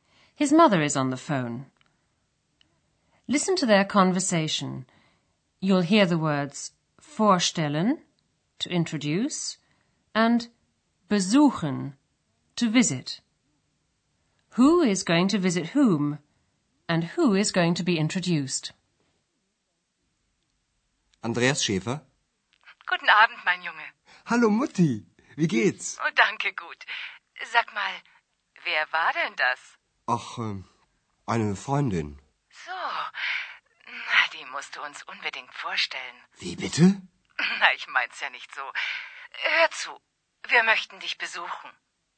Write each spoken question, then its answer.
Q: Who is going to visit whom?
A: Andreas's mother says she'd like to come and visit him in Aachen

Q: And who is going to be introduced?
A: and she'd also like to be introduced to X.